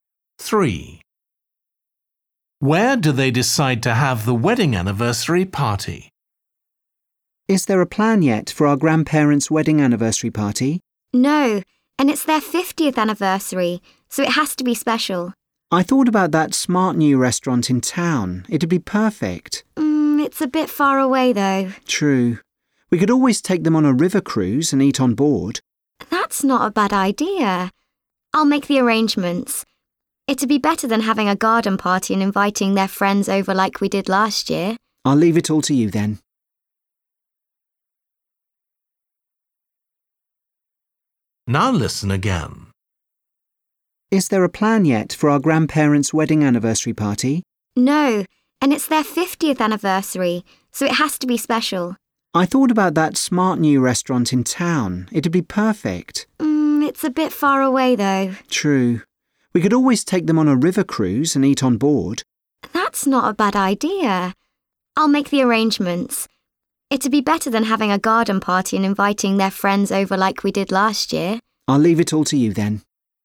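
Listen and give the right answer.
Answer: On a river cruise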